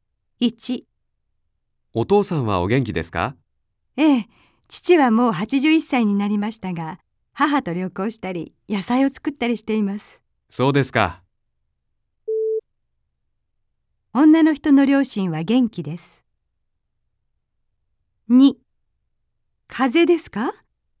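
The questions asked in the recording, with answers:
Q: 女の人の両親は元気です。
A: ○(正しい)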